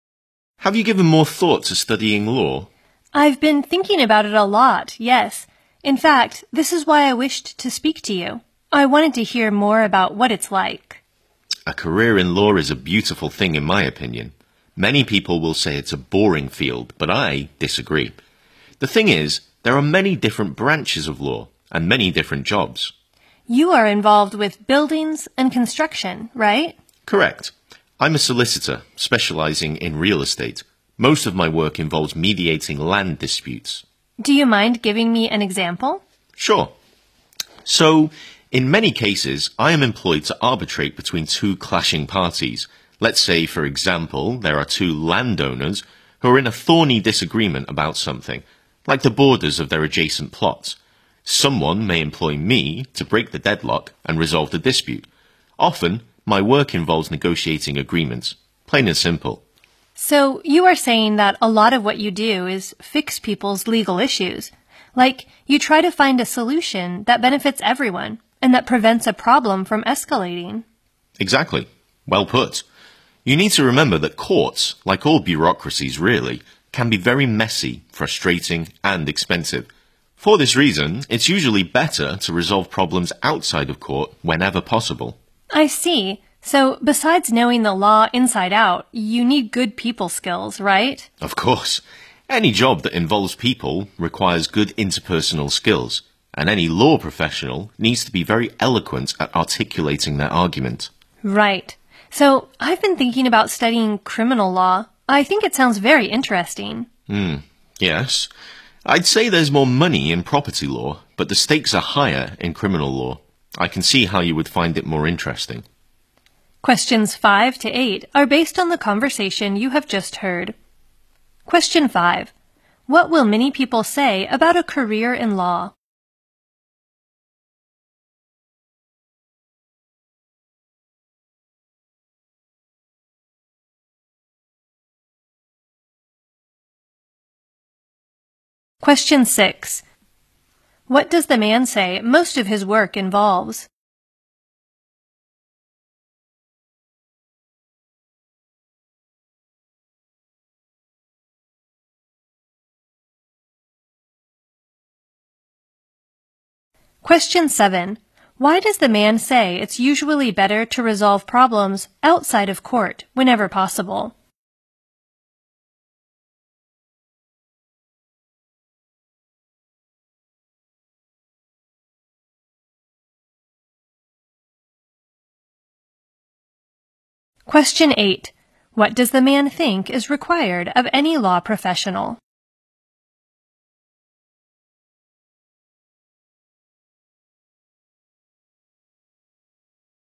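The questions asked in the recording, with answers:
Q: What will many people say about a career in law?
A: That it is a boring field.

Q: What does the man say most of his work involves?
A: Mediating land disputes.

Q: Why does the man say it's usually better to resolve problems outside of court whenever possible?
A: Courts can be messy, frustrating and expensive.

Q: What does the man think is required of any law professional?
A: Being very eloquent at articulating their argument.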